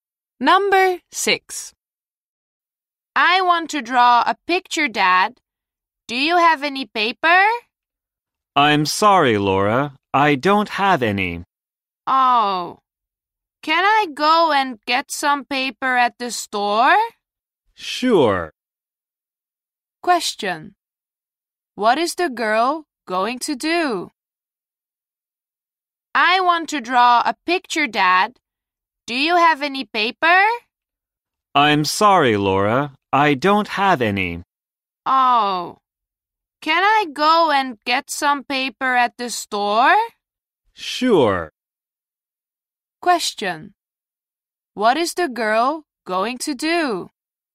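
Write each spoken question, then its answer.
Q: What is the girl going to do?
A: Go and get some paper at the store.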